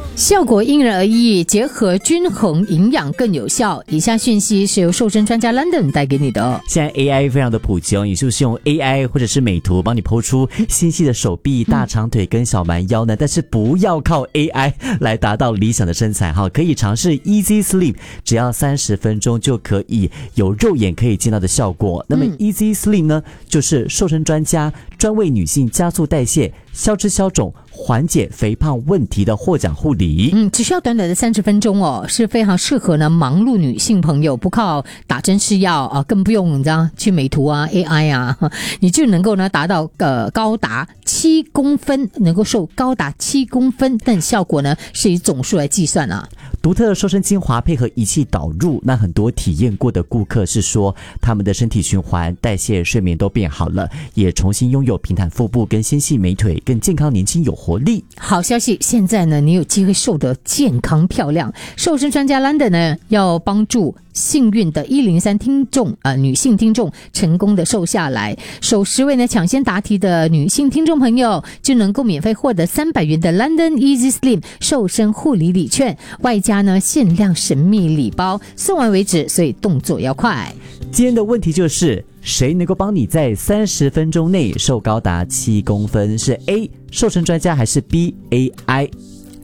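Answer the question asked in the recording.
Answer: A: 瘦身专家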